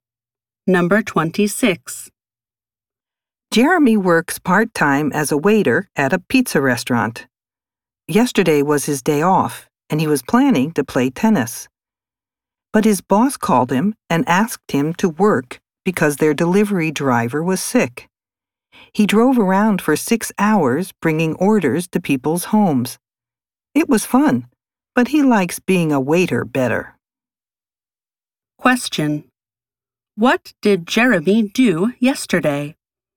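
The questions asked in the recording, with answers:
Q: What did Jeremy do yesterday?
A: He delivered pizzas to people's homes for his restaurant.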